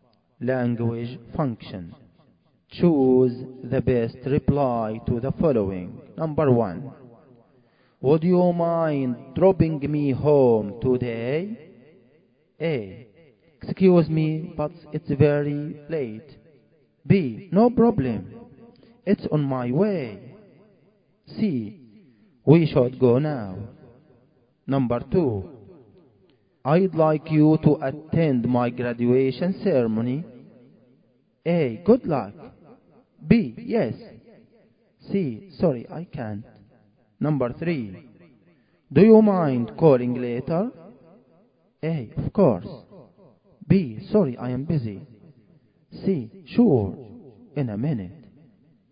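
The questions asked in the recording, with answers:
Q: would you mind dropping me home today?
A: B: No problem. It's on my way.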